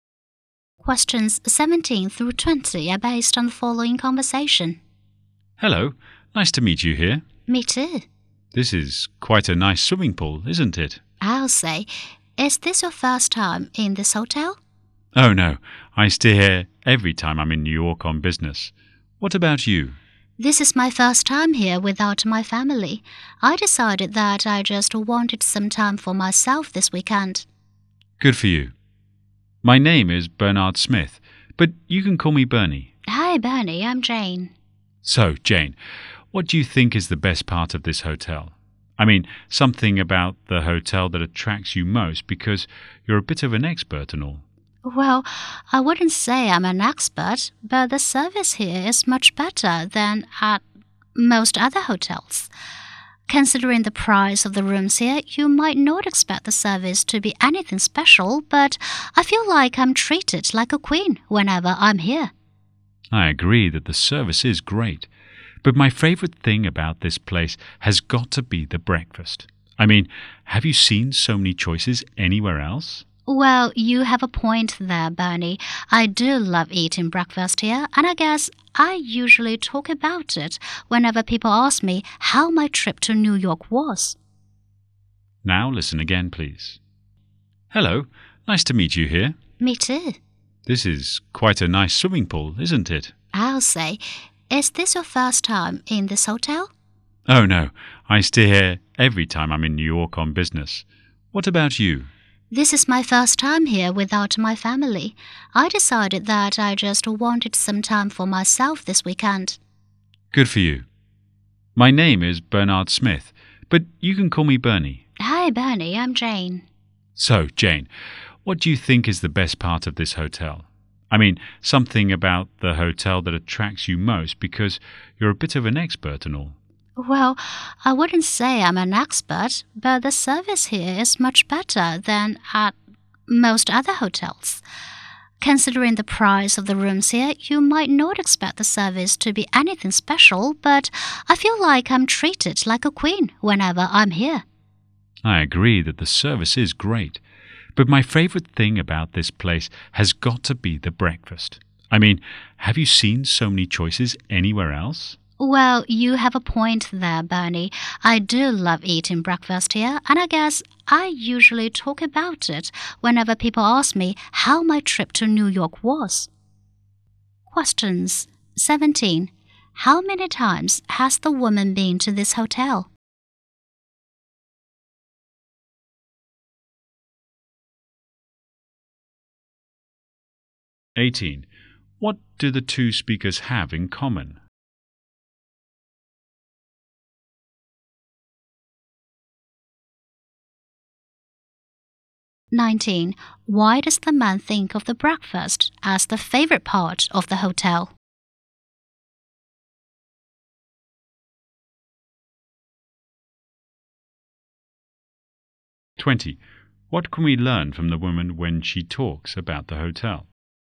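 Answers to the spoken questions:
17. Many times
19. It offers so many choices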